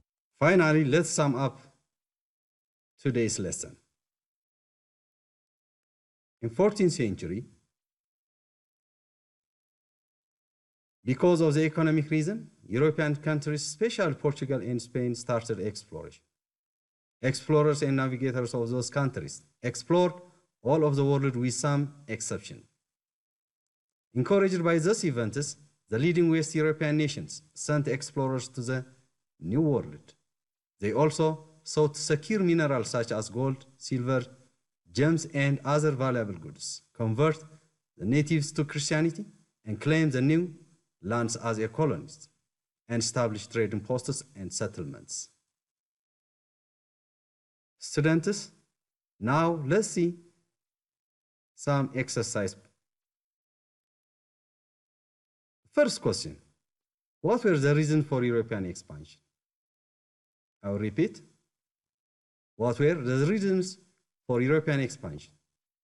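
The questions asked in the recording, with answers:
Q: what were the reasons for European expansion?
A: Economic reasons: seeking gold, silver, gems and other valuable goods, converting natives to Christianity, claiming colonies, and establishing trading posts and settlements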